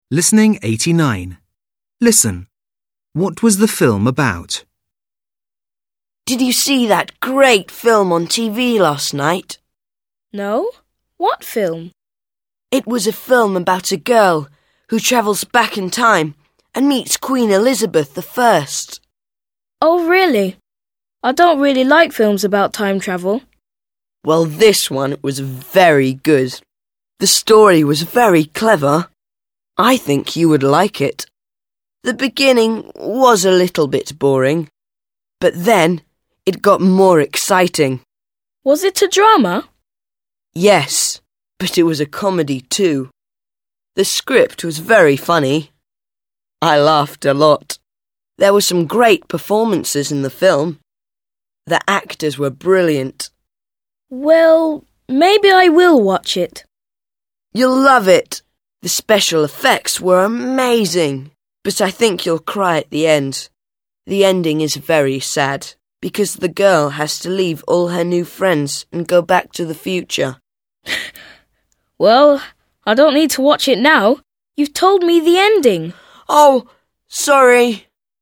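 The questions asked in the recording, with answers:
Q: What was the film about?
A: A girl who travels back in time and meets Queen Elizabeth I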